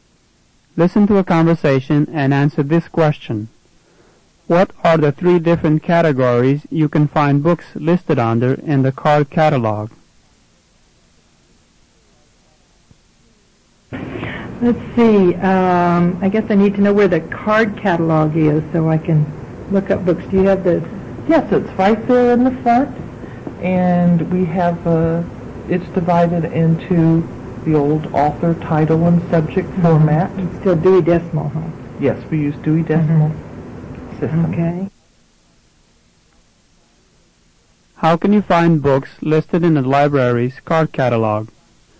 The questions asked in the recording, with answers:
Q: What are the three different categories you can find books listed under in the card catalog?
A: You should have written by author, title, and subject.